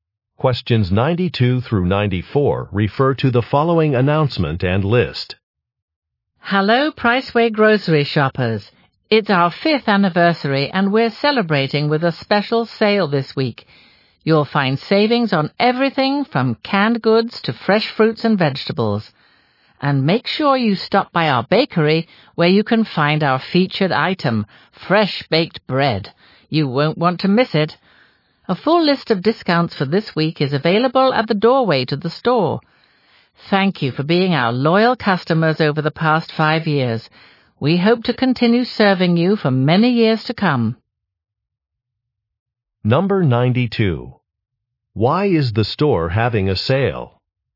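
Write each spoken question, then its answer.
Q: Why is the store having a sale?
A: To celebrate its fifth anniversary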